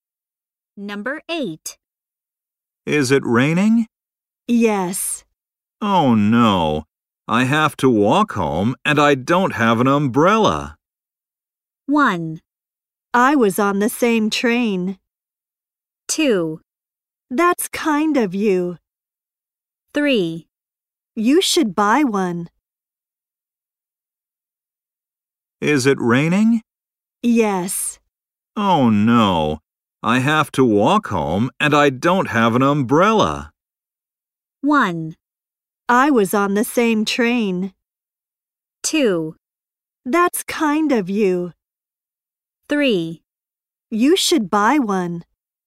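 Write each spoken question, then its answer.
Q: Oh no. I have to walk home and I don't have an umbrella.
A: 3: You should buy one.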